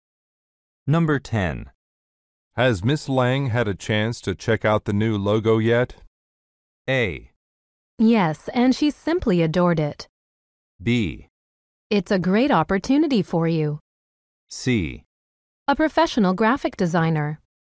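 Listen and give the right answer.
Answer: A: Yes, and she simply adored it.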